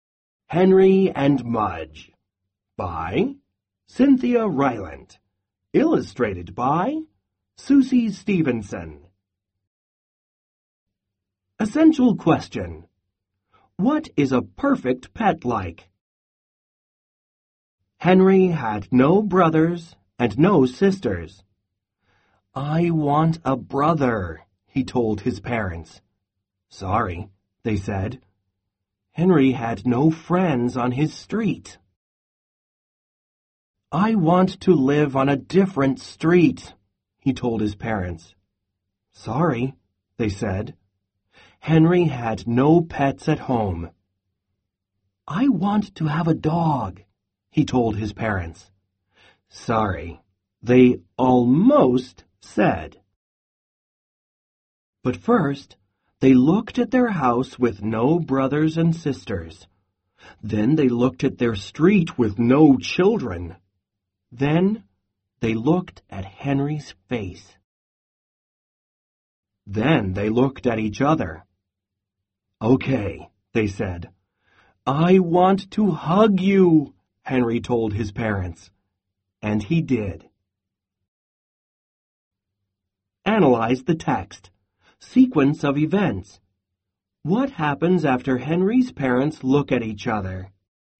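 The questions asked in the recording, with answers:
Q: What happens after Henry's parents look at each other?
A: They say "Okay" and agree to let Henry have a dog.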